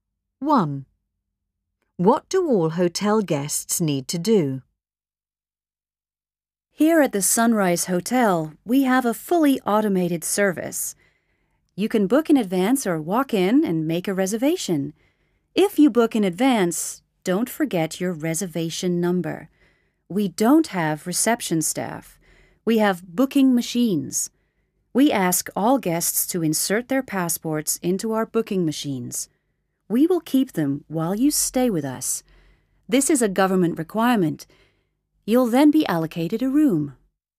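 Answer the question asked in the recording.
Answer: Insert their passports into the booking machines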